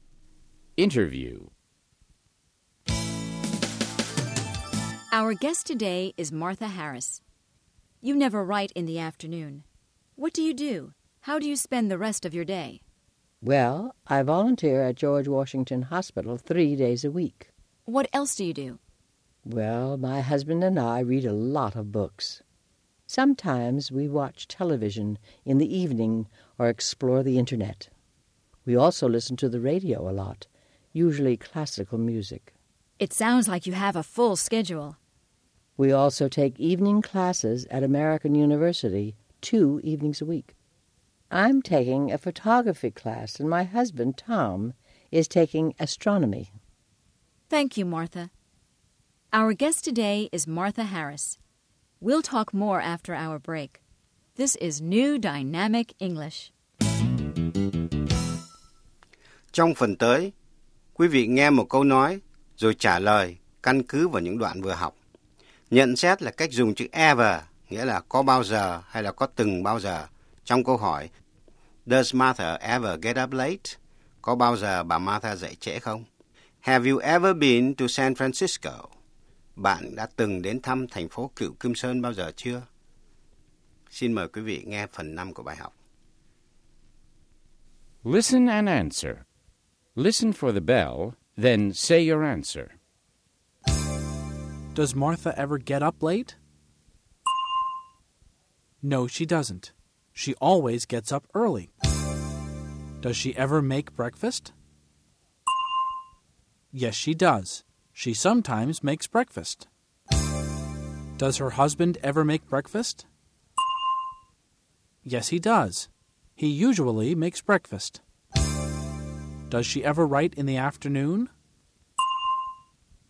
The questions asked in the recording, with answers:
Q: Does she ever write in the afternoon?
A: No, she doesn't. She never writes in the afternoon.